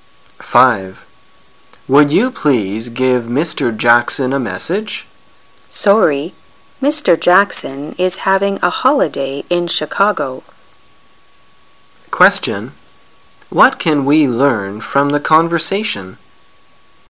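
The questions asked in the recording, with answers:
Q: What can we learn from the conversation?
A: Mr. Jackson is on holiday in Chicago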